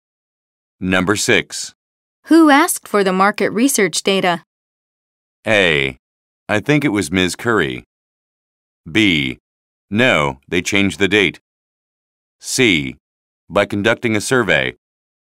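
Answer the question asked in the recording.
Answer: A: I think it was Ms. Curry.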